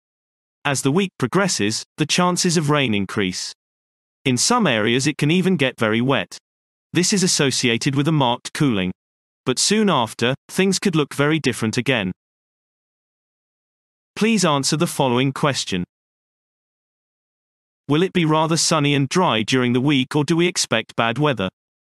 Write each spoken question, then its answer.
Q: Will it be rather sunny and dry during the week, or do we expect bad weather?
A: So, bad weather is predicted.